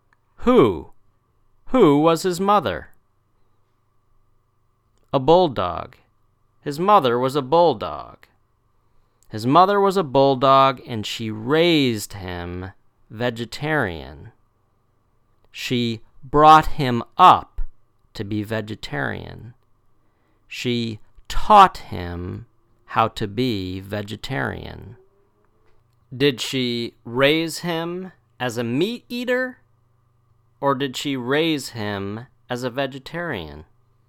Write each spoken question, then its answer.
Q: Did she raise him as a meat eater, or did she raise him as a vegetarian?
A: A vegetarian. She raised him as a vegetarian.